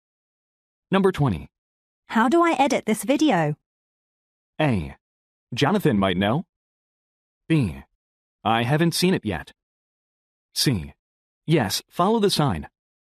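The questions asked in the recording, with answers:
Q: How do I edit this video?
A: A: Jonathan might know.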